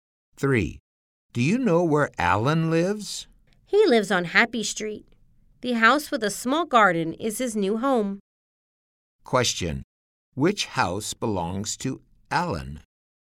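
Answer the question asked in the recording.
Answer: The house with a small garden on Happy Street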